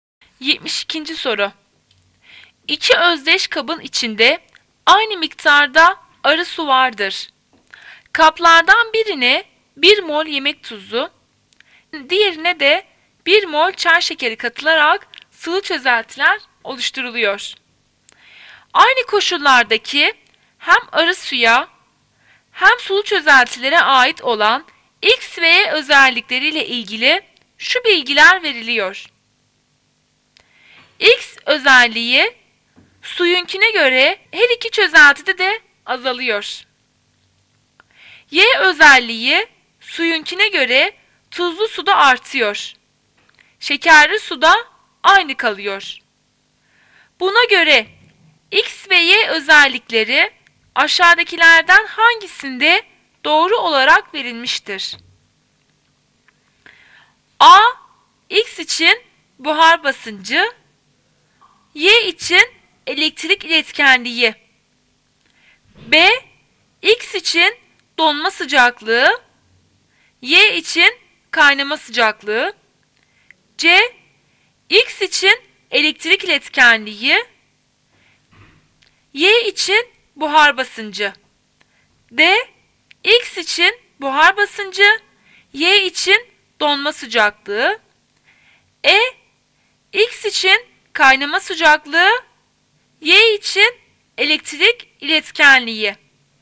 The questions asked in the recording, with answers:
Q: Buna göre X ve Y özellikleri aşağıdakilerden hangisinde doğru olarak verilmiştir?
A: Cevap A. X için buhar basıncı, Y için elektrik iletkenliği.